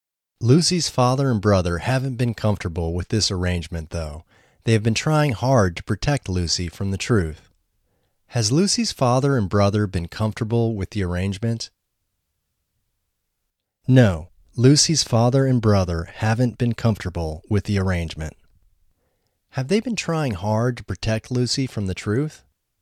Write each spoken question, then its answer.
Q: Have they been trying hard to protect Lucy from the truth?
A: Yes, they have been trying hard to protect Lucy from the truth.